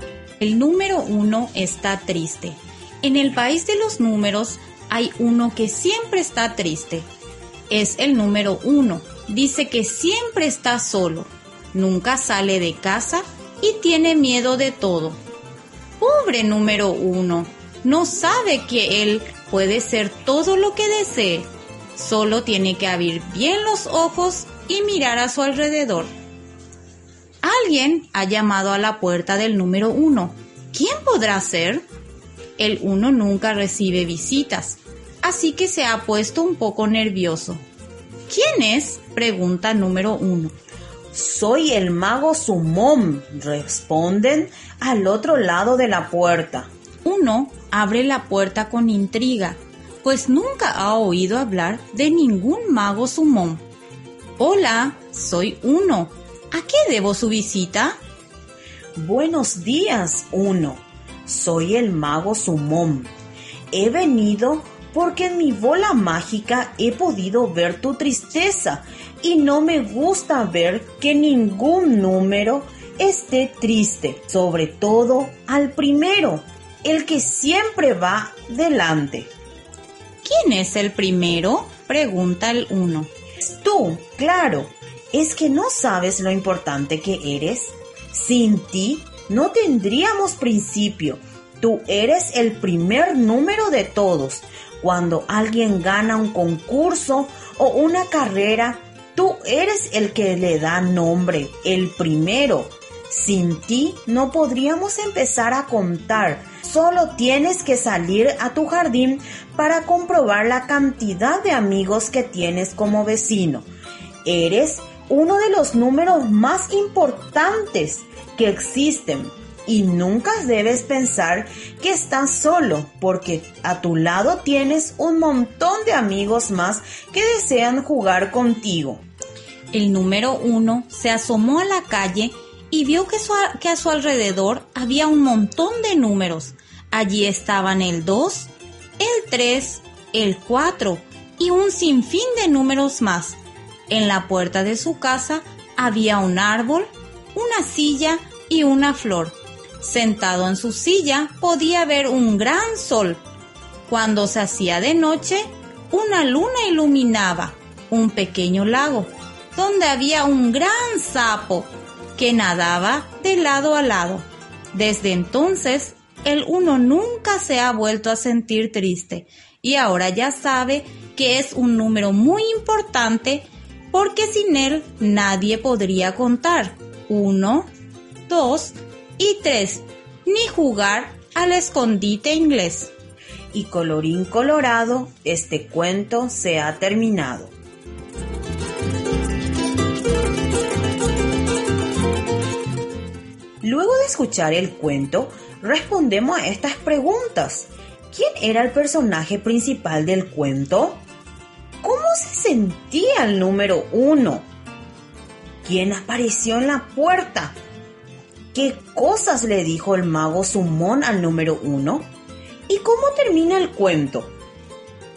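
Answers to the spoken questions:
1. El número uno
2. Triste (y solo)
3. El mago Sumón
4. Que es el primero y muy importante, que sin él no se podría empezar a contar y que no está solo porque tiene muchos amigos
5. El uno ya no se siente triste y sabe que es un número muy importante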